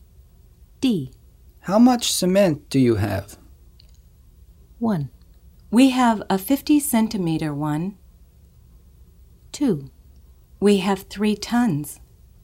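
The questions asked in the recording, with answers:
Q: How much cement do you have?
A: 2: We have 3 tons.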